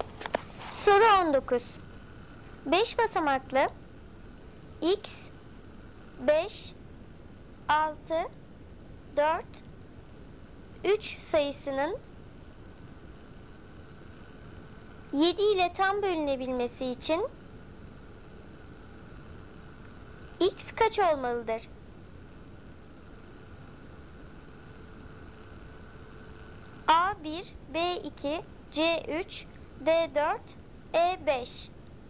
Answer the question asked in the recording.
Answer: Doğru cevap E 5.